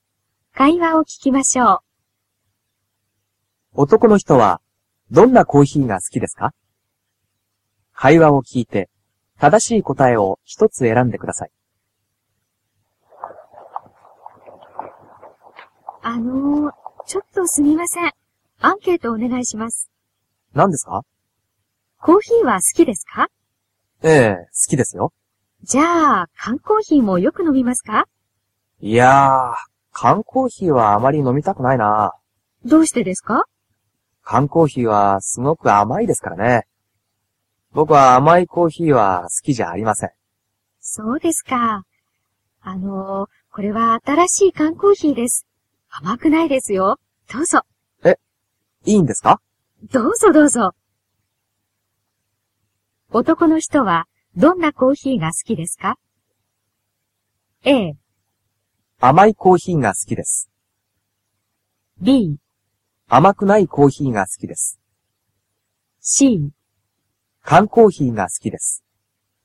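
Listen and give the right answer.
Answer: B: 甘くないコーヒーが好きです。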